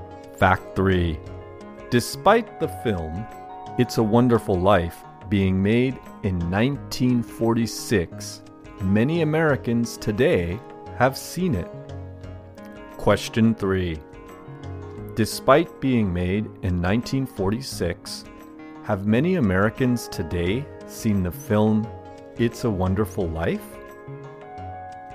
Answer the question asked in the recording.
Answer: yes.